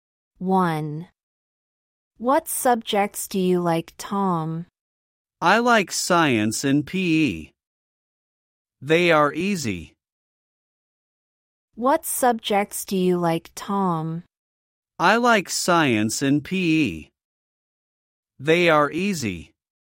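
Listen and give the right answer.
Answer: Science and PE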